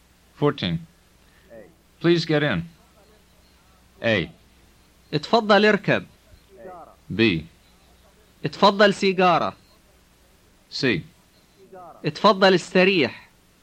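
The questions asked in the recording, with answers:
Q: Please get in.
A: A: اتفضل اركب.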